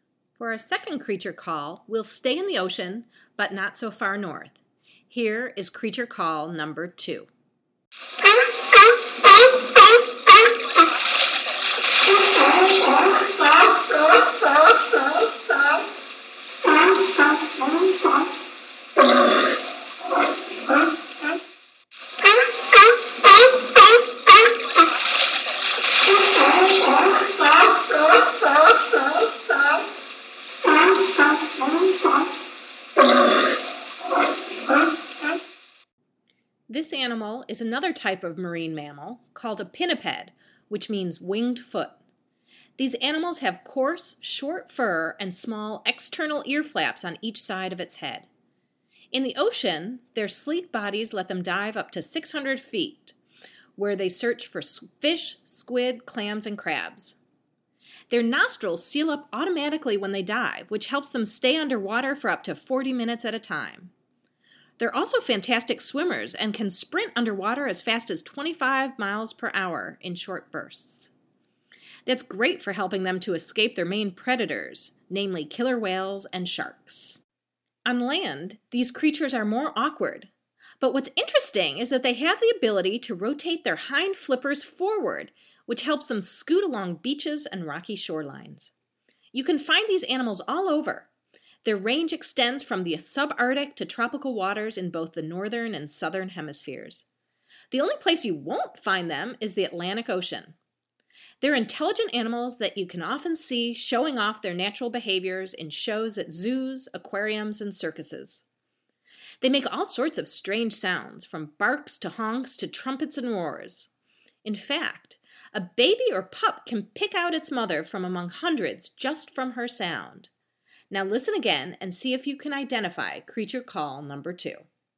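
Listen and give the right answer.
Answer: sea lion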